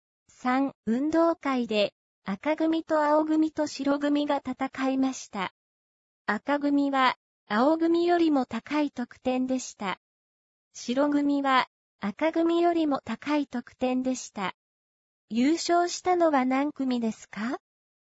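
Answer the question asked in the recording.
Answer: 白組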